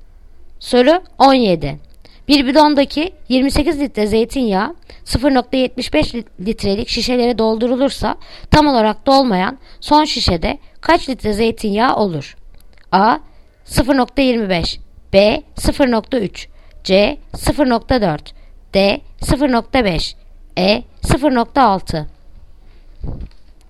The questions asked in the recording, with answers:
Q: Bir bidondaki 28 litre zeytinyağı 0,75 litrelik şişelere doldurulursa tam olarak dolmayan son şişede kaç litre zeytinyağı olur?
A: Yanıt Adana 0,25